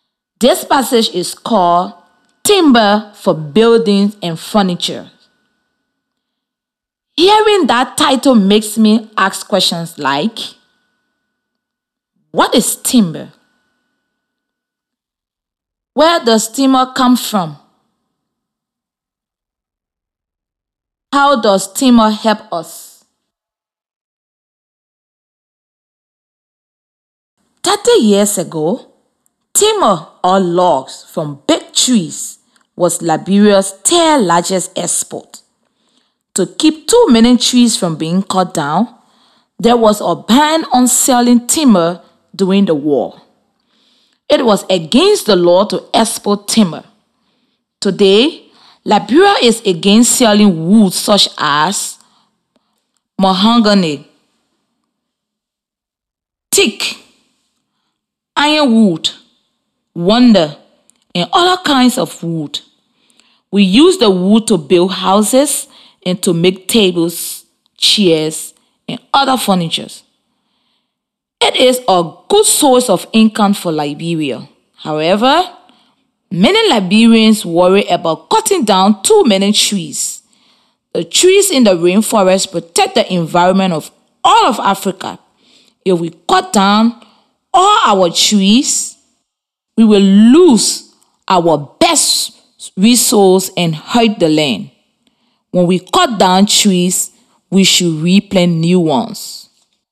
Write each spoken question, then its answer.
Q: what is timber?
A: The passage tells us that timber means logs from big trees.

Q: Where does timber come from?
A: Timber comes from the big trees in the rainforest when they are cut down.

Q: How does timber help us?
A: The passage tells us that timber is used for making houses and furniture.